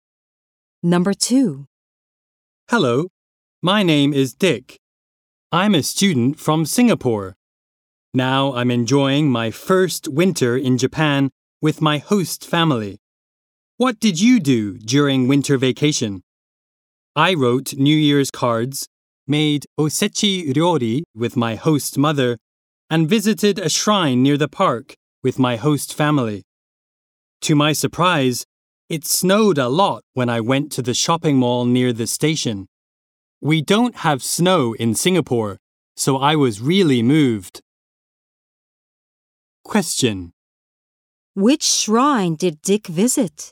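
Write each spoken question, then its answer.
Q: Which shrine did Dick visit?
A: The shrine near the park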